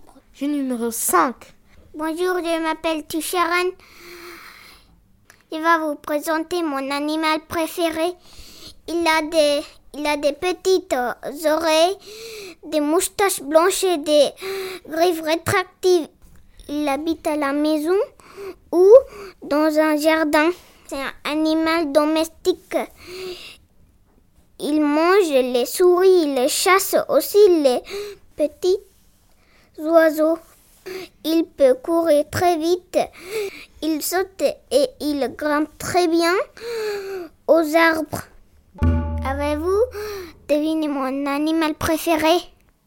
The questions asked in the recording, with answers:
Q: Avez-vous deviné mon animal préféré?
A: Mon animal préféré, c'est un chat.